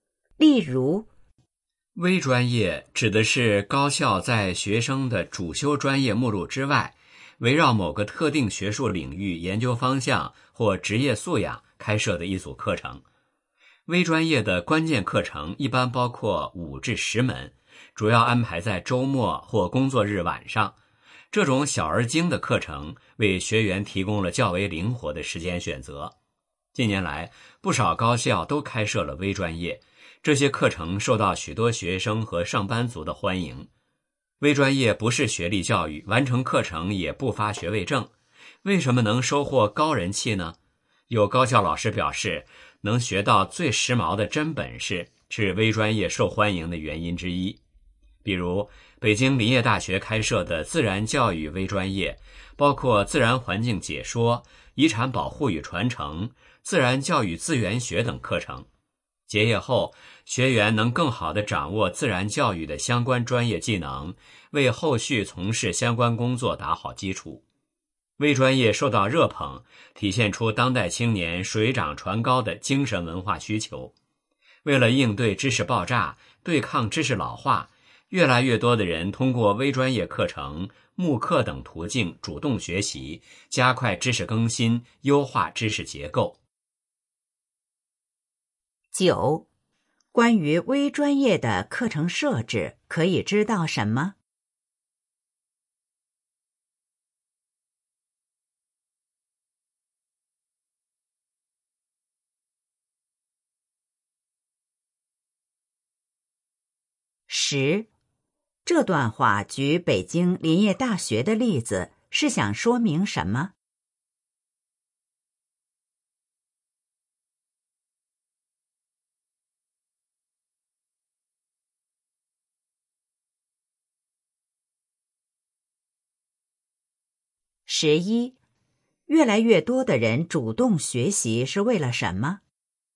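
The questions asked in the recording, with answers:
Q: 关于微专业的课程设置,可以知道什么?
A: 关键课程一般五至十门,主要安排在周末或工作日晚上,时间灵活

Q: 这段话举北京林业大学的例子,是想说明什 么?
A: 微专业能学到最时髦的真本事

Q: 越来越多的人主动学习是为了什么?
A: 应对知识爆炸,对抗知识老化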